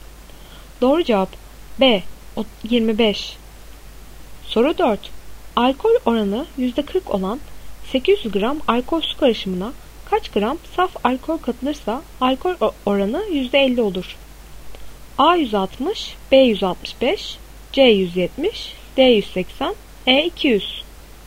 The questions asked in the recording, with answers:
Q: Alkol oranı %40 olan 800 gram alkol su karışımına kaç gram saf alkol katılırsa alkol oranı %50 olur?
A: Doğru cevap A 160.